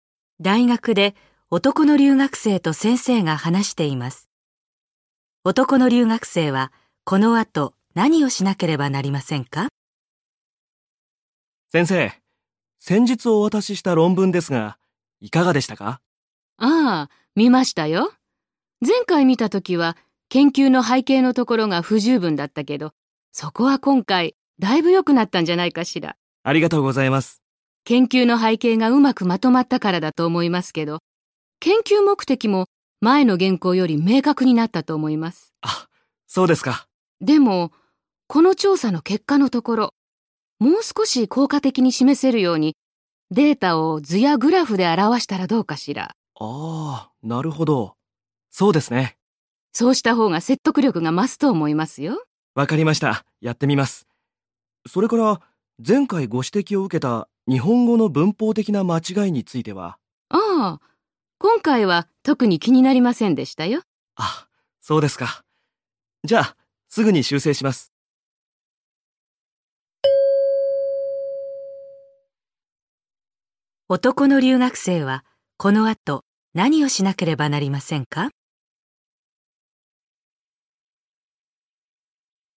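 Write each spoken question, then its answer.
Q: 男の留学生はこの後何をしなければなりませんか?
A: 調査の結果のデータを図やグラフで表す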